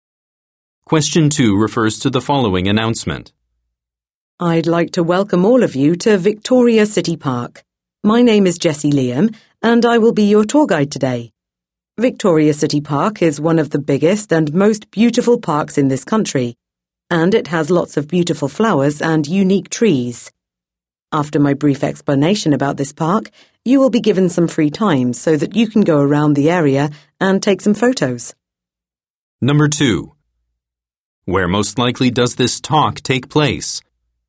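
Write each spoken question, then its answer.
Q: Where most likely does this talk take place?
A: At Victoria City Park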